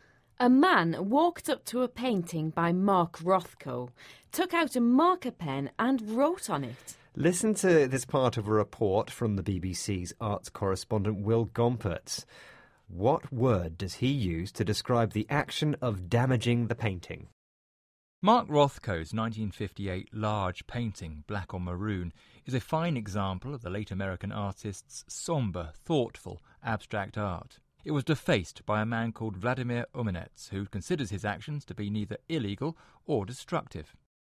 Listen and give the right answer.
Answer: He said that the painting was defaced.